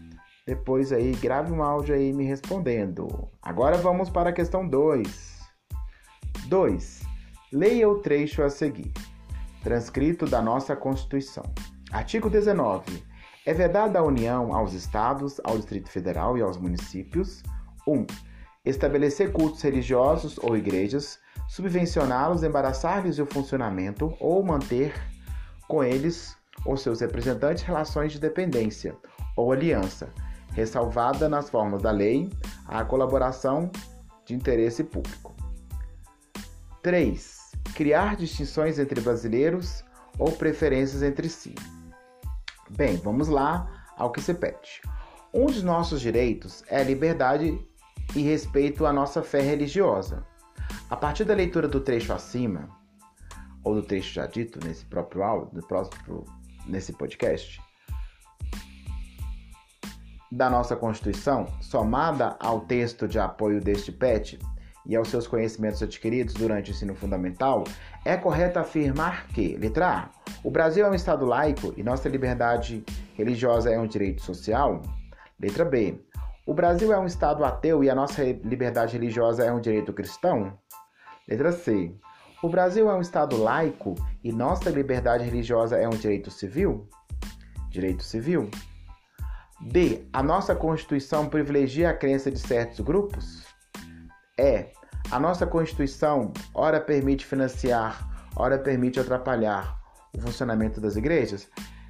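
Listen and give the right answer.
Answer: C: o Brasil é um Estado laico e nossa liberdade religiosa é um direito civil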